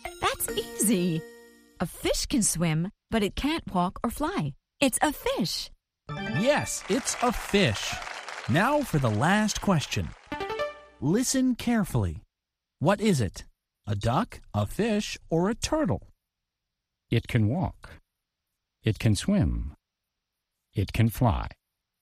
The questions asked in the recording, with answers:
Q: What is it?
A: It's a duck. A duck can swim, and a duck can walk, and a duck can fly.